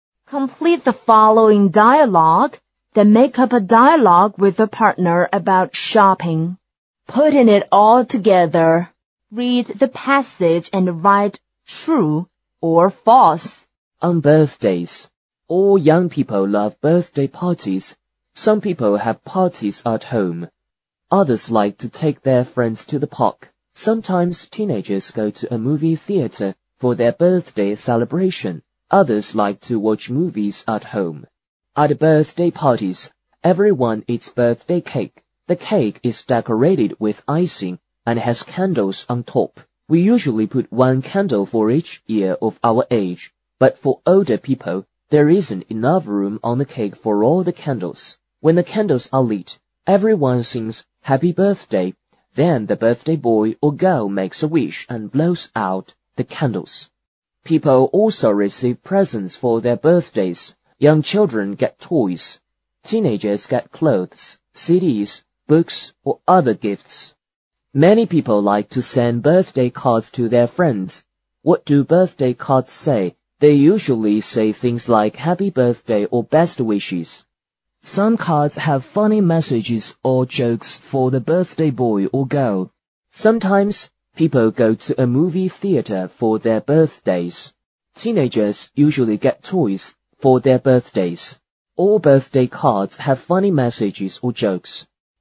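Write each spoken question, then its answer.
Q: Sometimes, people go to a movie theater for their birthdays.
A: True

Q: Teenagers usually get toys for their birthdays.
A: False

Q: All birthday cards have funny messages or jokes.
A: False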